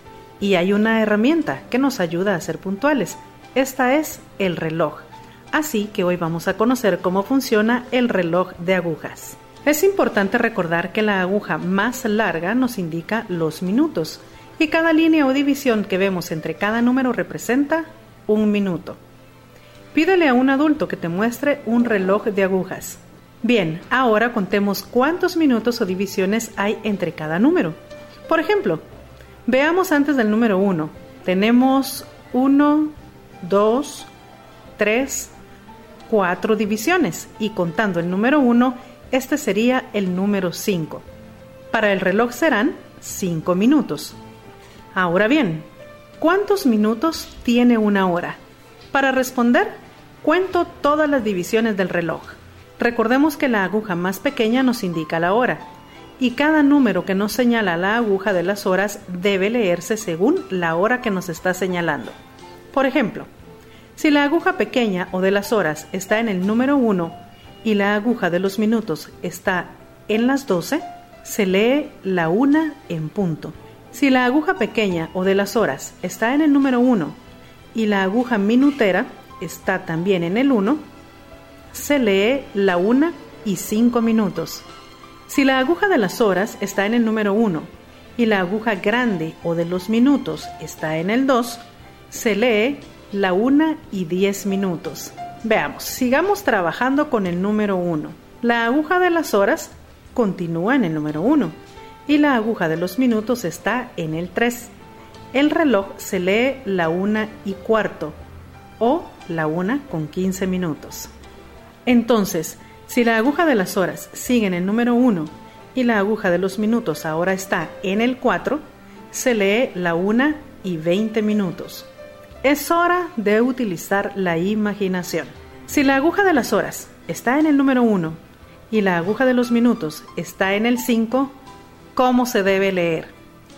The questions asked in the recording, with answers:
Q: Si la aguja de las horas está en el número 1 y la aguja de los minutos está en el 5, ¿cómo se debe leer?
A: Se lee la 1 y 25 minutos.